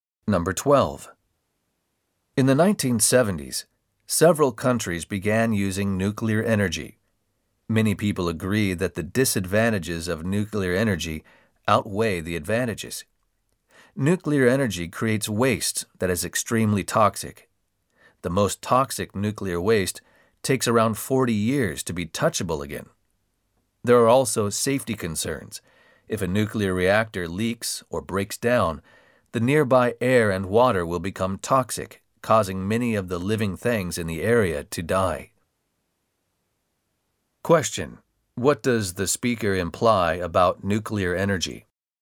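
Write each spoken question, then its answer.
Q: What does the speaker imply about nuclear energy?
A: Its disadvantages (toxic waste, safety risks) outweigh its advantages; it is dangerous.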